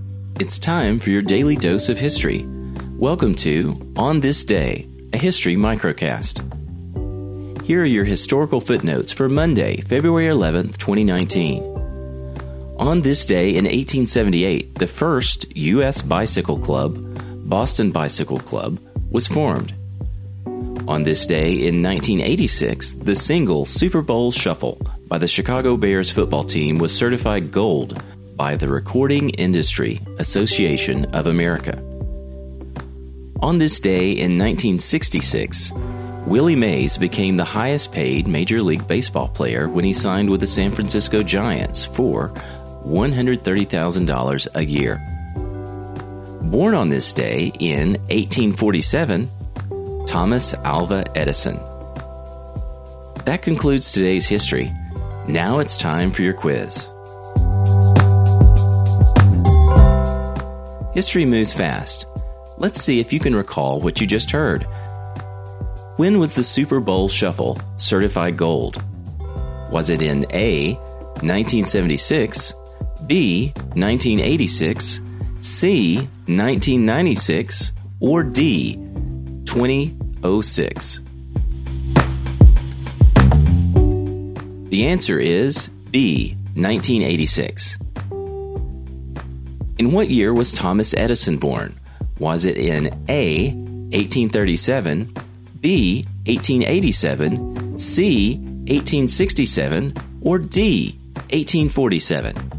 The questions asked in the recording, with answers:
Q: In what year was Thomas Edison born?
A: The answer is D, 1847.